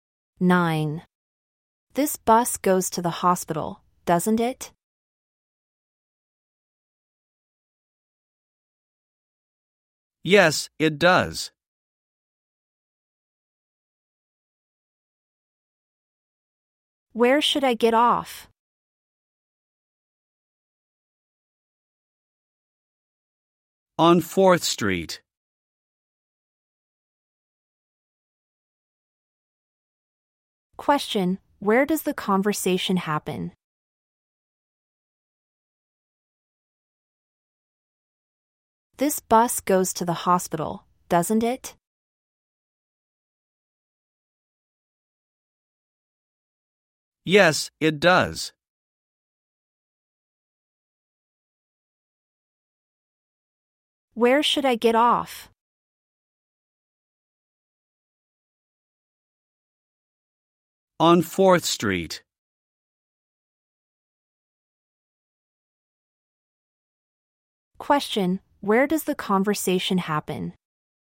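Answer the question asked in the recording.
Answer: On a bus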